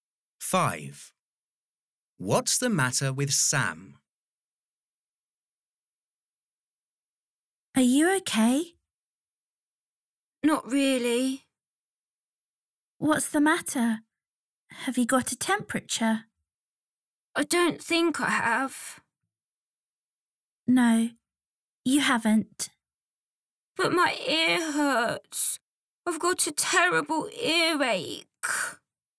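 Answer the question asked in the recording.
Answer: earache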